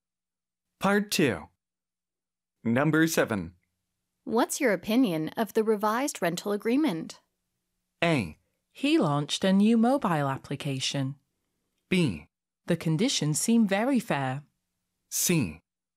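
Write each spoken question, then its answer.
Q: What's your opinion of the revised rental agreement?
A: B: The conditions seem very fair.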